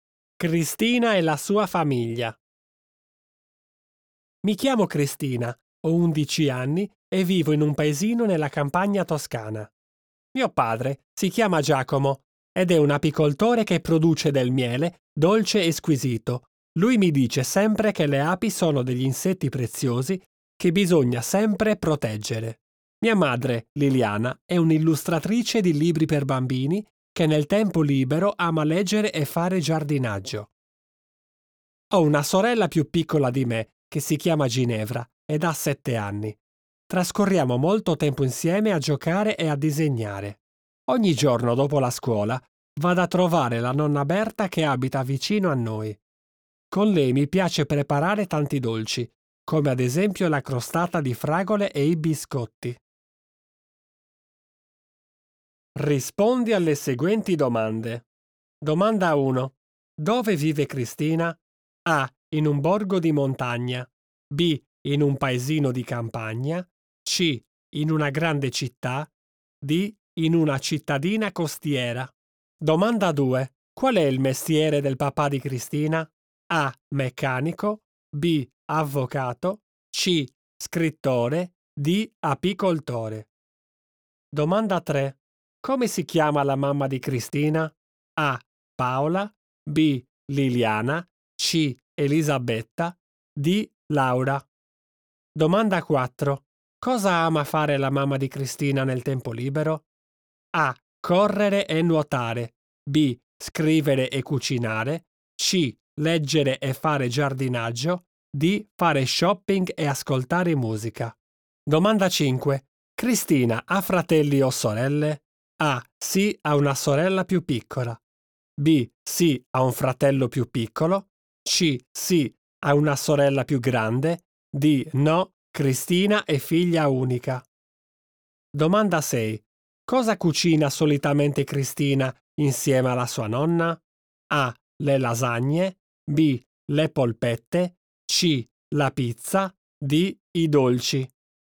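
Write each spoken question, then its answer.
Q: Dove vive Cristina?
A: B: In un paesino di campagna.

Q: Qual è il mestiere del papà di Cristina?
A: D: Apicoltore.

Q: Come si chiama la mamma di Cristina?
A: B: Liliana.

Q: Cosa ama fare la mamma di Cristina nel tempo libero?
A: C: Leggere e fare giardinaggio.

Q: Cristina ha fratelli o sorelle?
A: A: Sì, ha una sorella più piccola.

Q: Cosa cucina solitamente Cristina insieme alla sua nonna?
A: D: I dolci.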